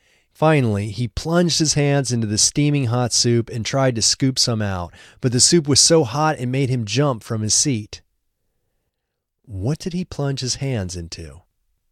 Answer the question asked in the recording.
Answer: He plunged his hands into the soup.